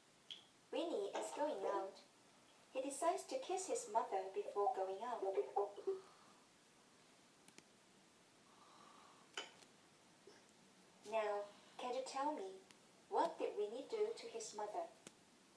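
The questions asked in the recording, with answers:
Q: Now, can you tell me, what did Winnie do to his mother?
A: He kissed his mother.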